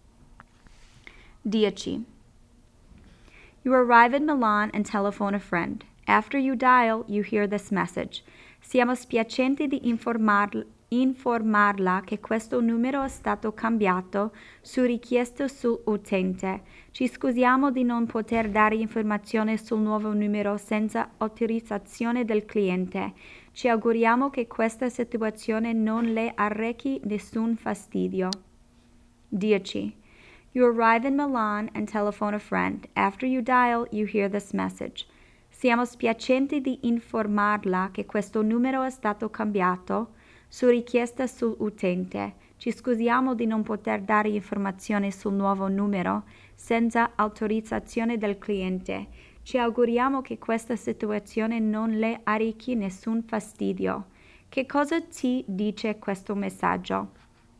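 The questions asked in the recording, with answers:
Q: Che cosa ti dice questo messaggio?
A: Il numero è stato cambiato e non possono dare il nuovo numero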